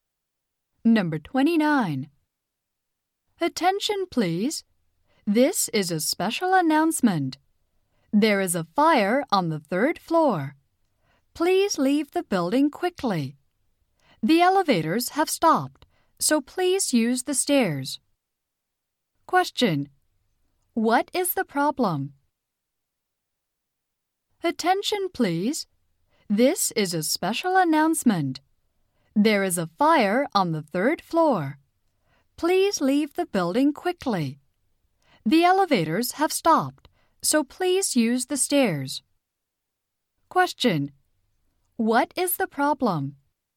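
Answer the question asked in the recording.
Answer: There is a fire on the third floor.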